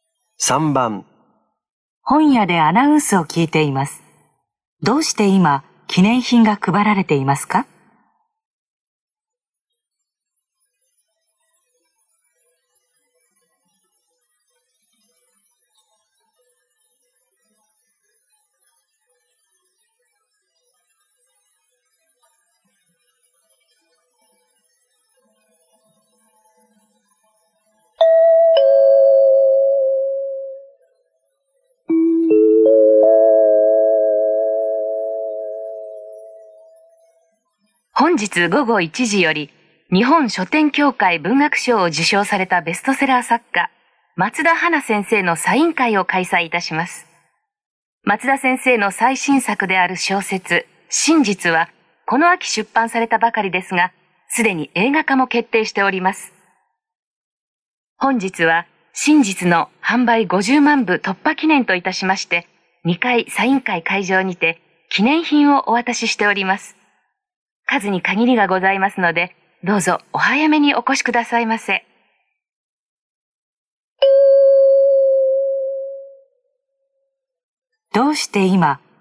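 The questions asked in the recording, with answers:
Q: どうして今、記念品が配られていますか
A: 小説「真実」の販売が50万部を突破したから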